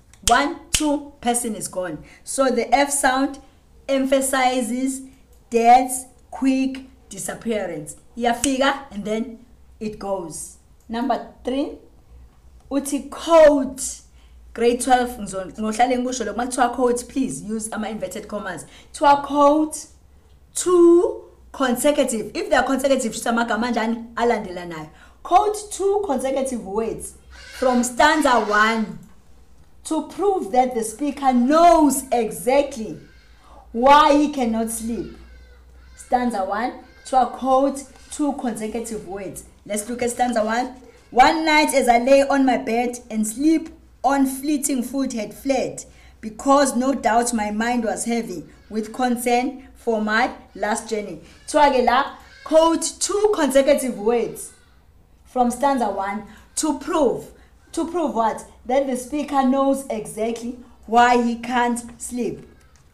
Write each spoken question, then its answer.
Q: Quote 2 consecutive words from stanza 1 to prove that the speaker knows exactly why he cannot sleep.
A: Those consecutive words are no doubt.